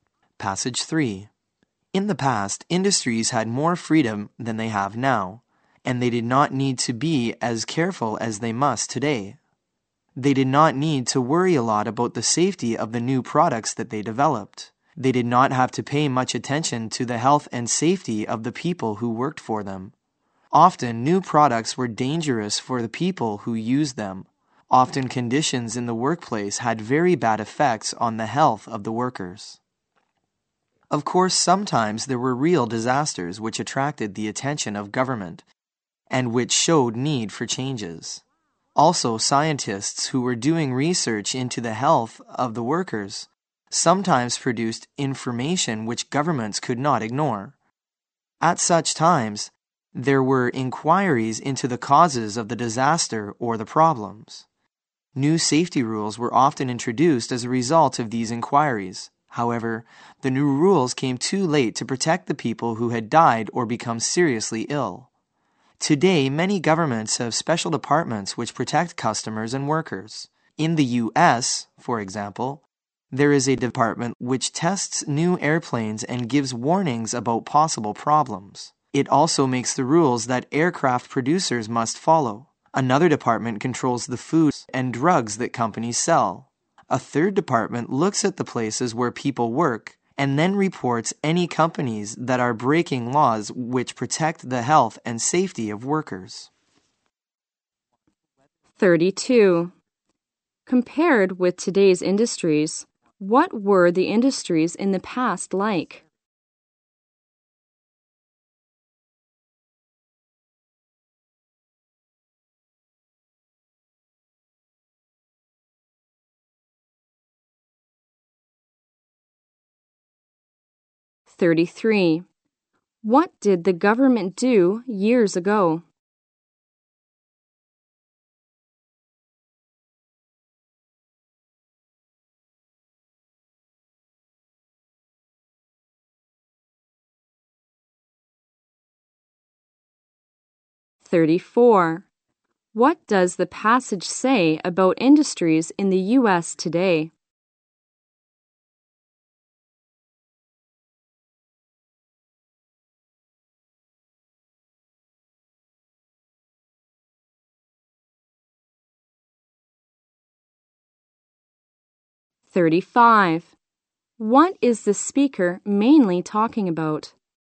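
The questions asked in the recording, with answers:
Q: Compared with today's industries, what were the industries in the past like?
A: They had more freedom and did not need to be as careful

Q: What did the government do years ago?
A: Held inquiries after disasters and introduced new safety rules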